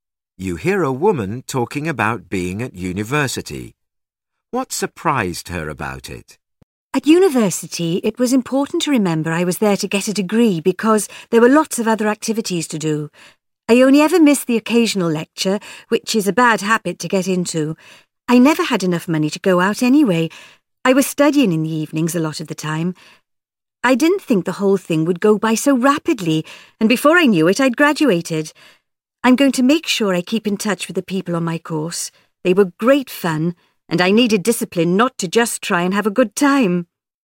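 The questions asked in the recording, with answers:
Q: What surprised her about it?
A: How quickly it went by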